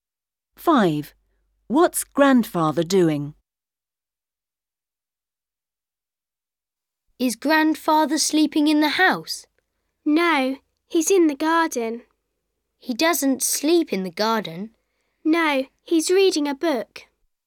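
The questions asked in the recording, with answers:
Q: What's Grandfather doing?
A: Reading a book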